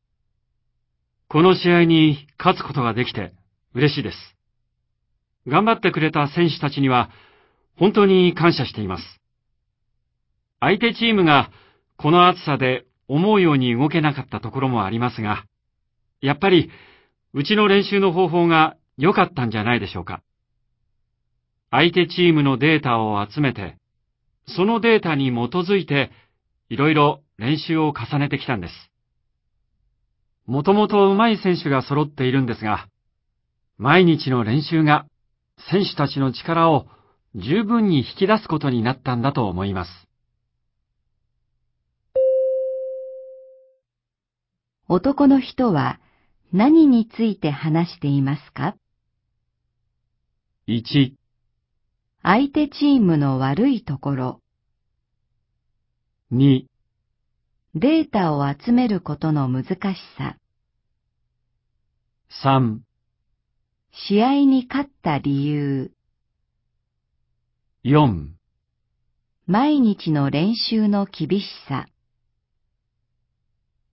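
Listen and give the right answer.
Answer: 3: 試合に勝った理由。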